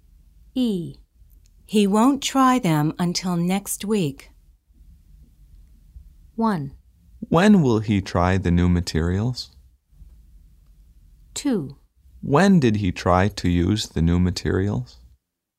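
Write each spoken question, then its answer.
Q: He won't try them until next week.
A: 1: When will he try the new materials?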